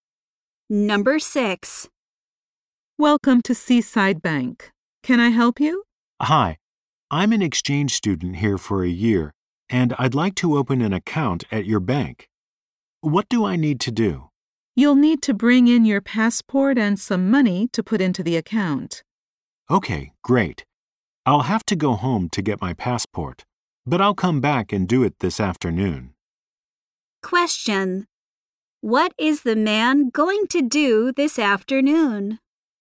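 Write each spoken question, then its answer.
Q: What is the man going to do this afternoon?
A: Come back to the bank with his passport to open an account.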